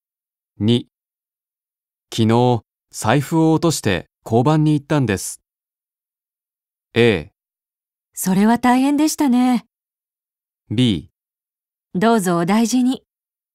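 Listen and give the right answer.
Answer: A: それは大変でしたね。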